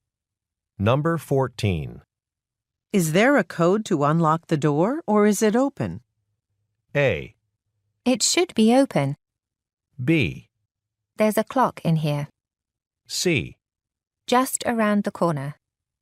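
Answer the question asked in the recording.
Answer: A: It should be open.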